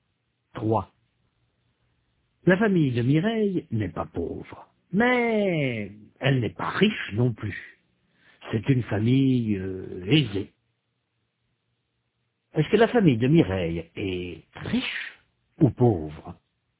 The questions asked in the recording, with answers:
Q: Est-ce que la famille de Mireille est riche ou pauvre?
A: Elle n'est pas pauvre, mais elle n'est pas riche non plus.